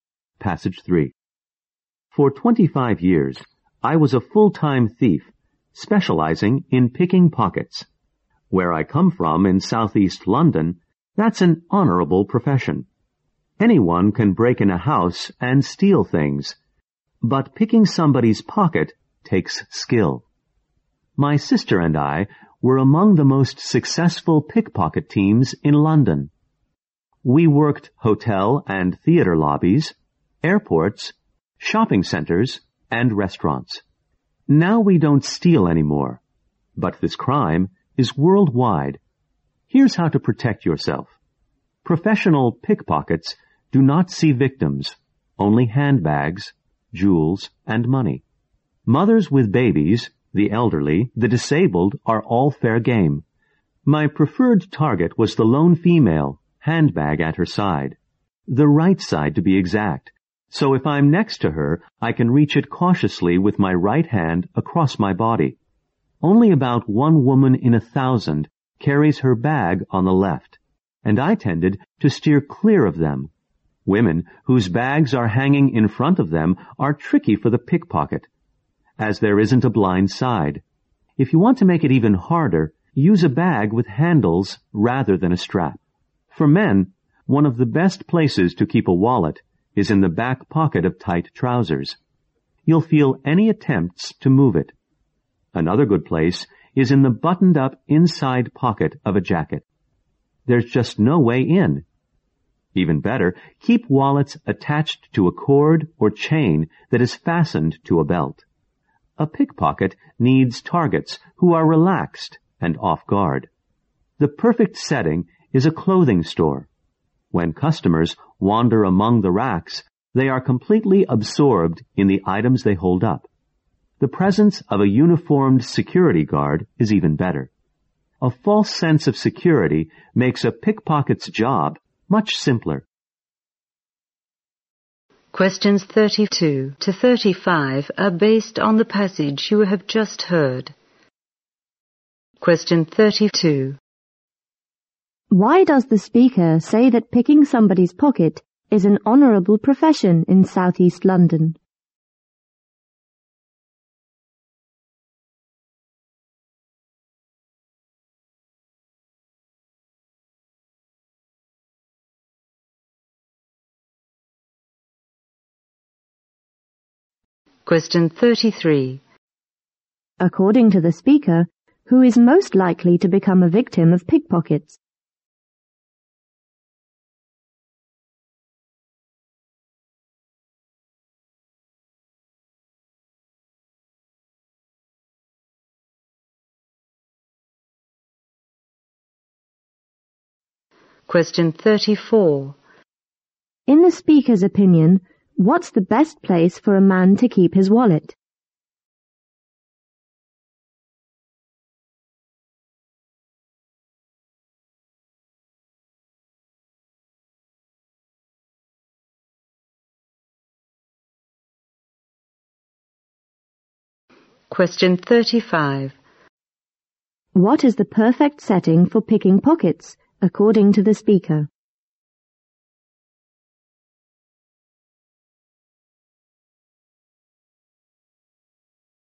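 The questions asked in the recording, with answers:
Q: Why does the speaker say that picking somebody's pocket is an honourable profession in Southeast London?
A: Because it takes skill.

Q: According to the speaker, who is most likely to become a victim of pickpockets?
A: A woman alone with her handbag on her right side.

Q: What is the perfect setting for picking pockets, according to the speaker?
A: A clothing store.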